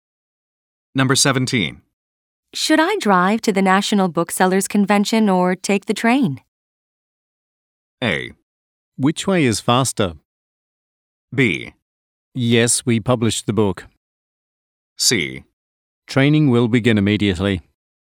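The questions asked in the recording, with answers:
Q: Should I drive to the National Booksellers Convention or take the train?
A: A: Which way is faster?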